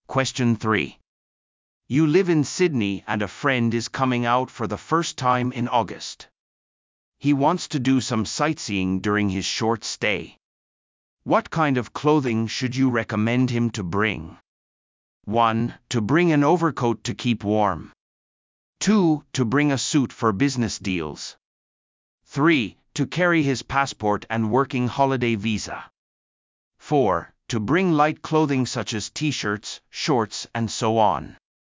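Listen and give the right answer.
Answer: 1: To bring an overcoat to keep warm.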